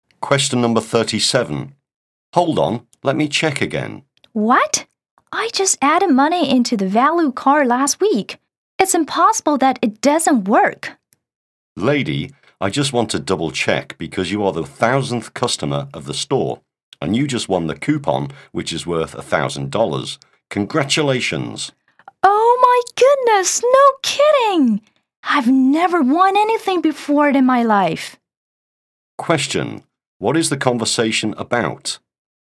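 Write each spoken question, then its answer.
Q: What is the conversation about?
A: The woman won a $1,000 coupon for being the store's 1,000th customer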